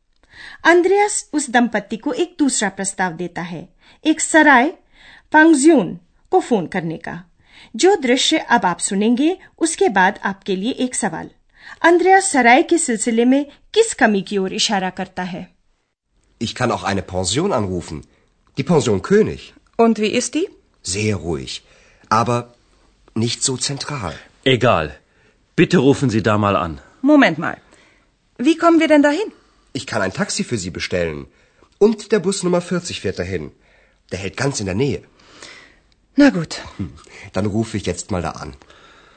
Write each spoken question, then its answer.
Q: Andreas सराय के सिलसिले में किस कमी की ओर इशारा करता है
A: लेकिन वह शहर के केंद्र में नहीं है